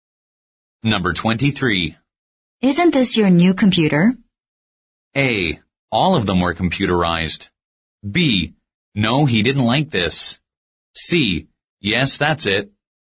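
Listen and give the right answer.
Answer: C: Yes, that's it.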